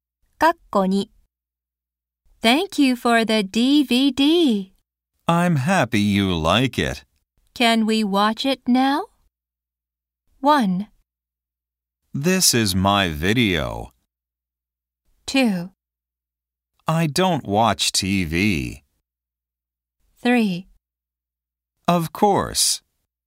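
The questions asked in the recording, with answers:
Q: Can we watch it now?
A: 3: Of course.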